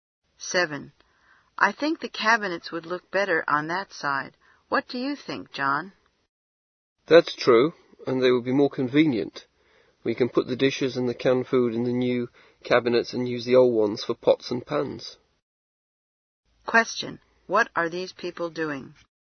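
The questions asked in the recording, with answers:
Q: What are these people doing?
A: Arranging kitchen cabinets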